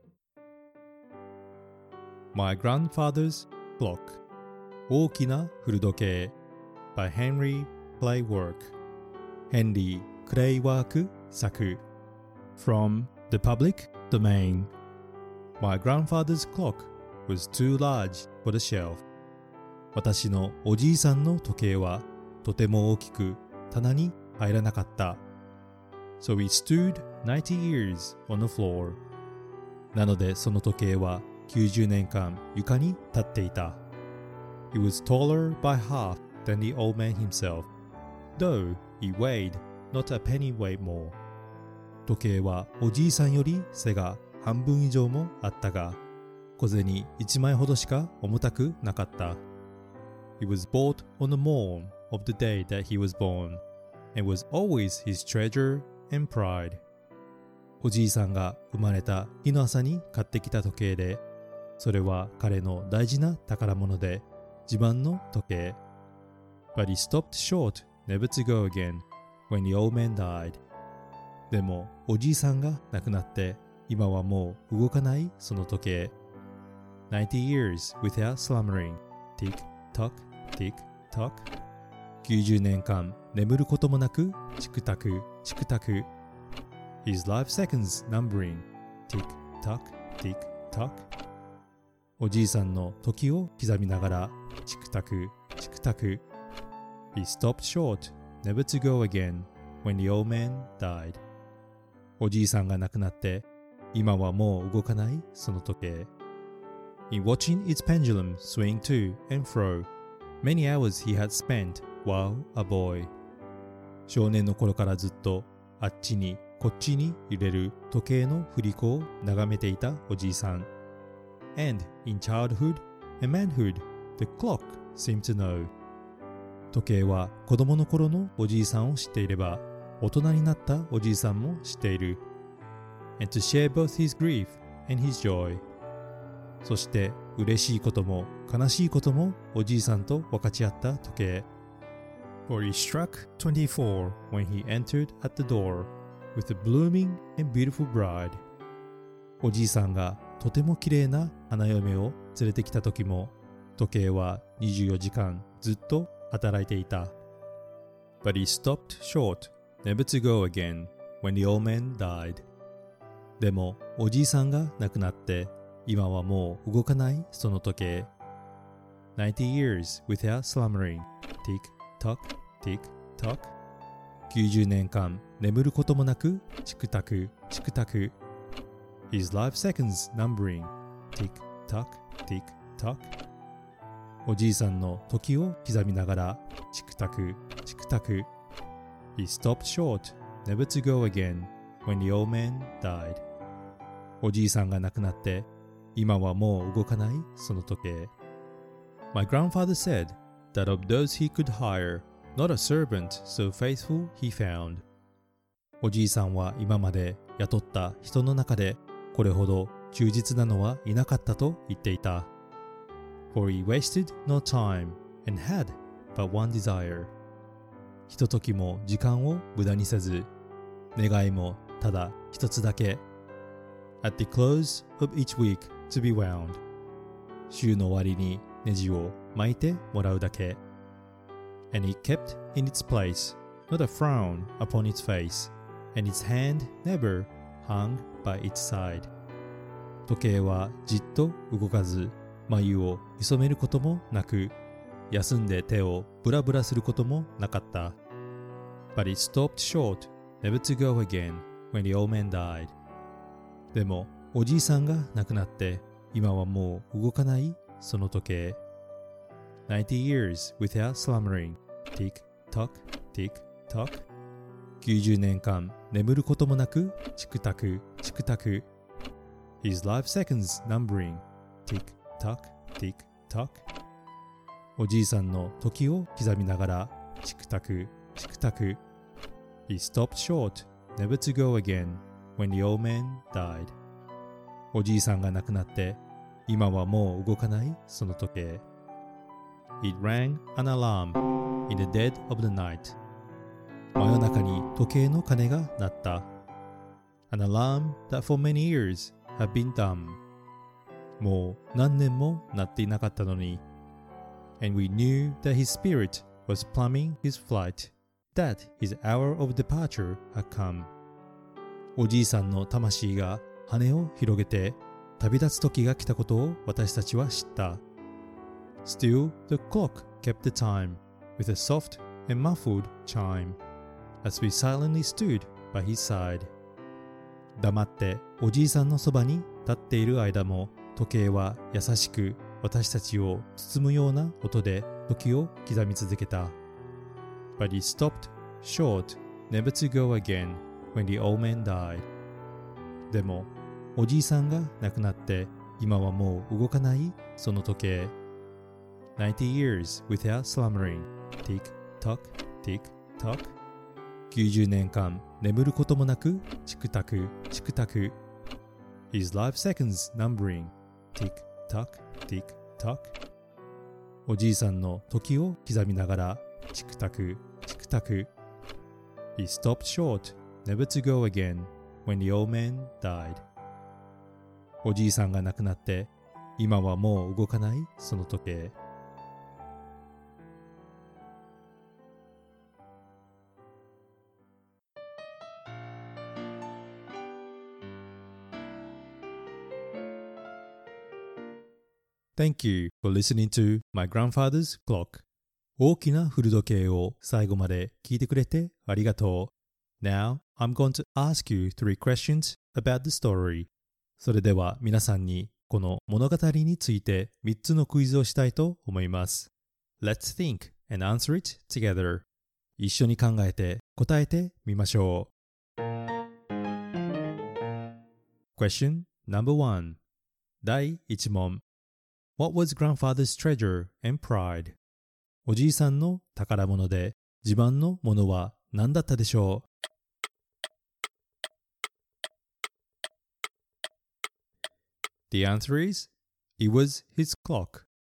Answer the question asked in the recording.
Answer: 答えはおじいさんの時計です。